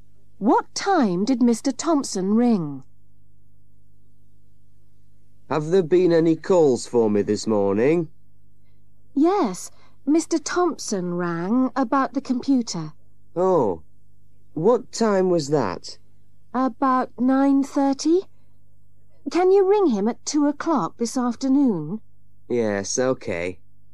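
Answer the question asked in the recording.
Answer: About 9:30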